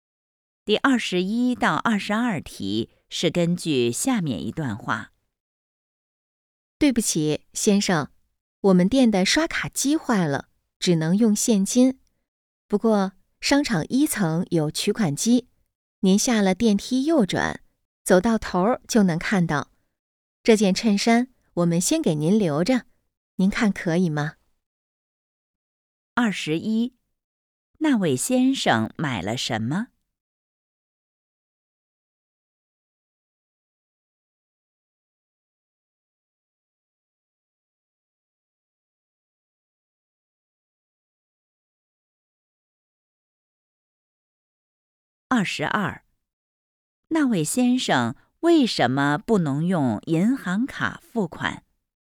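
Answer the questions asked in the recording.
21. 衬衫
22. 店里的刷卡机坏了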